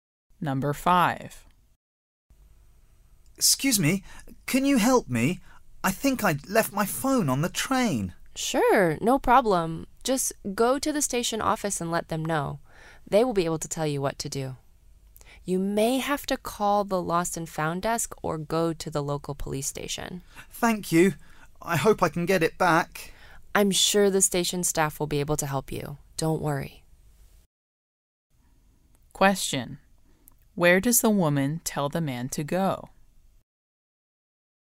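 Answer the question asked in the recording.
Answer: To the station office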